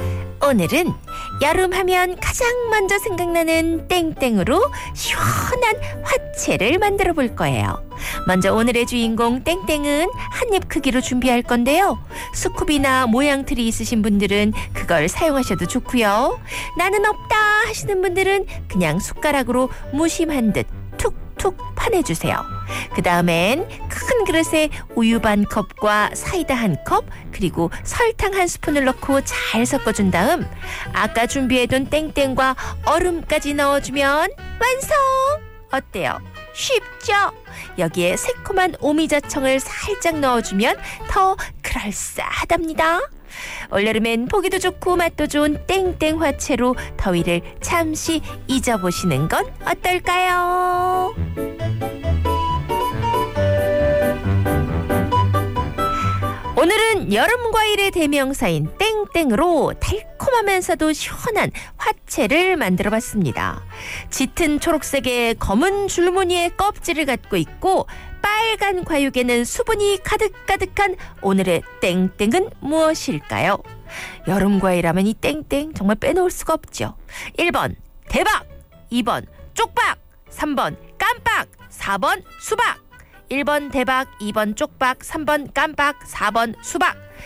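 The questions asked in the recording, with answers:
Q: 짙은 초록색의 검은 줄무늬의 껍질을 갖고 있고 빨간 과육에는 수분이 가득가득한 오늘의 땡땡은 무엇일까요?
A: 4: 수박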